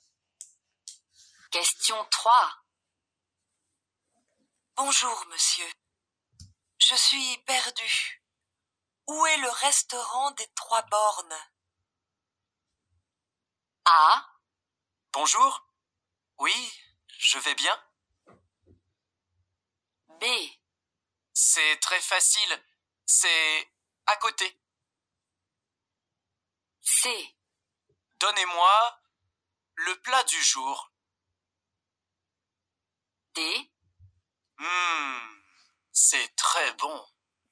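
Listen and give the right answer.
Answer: B: C'est très facile. C'est à côté.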